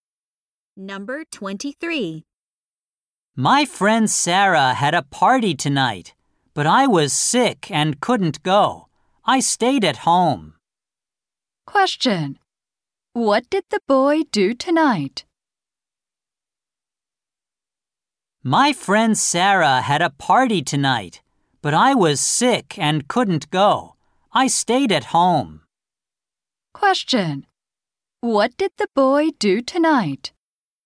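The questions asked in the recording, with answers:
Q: What did the boy do tonight?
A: He stayed at home.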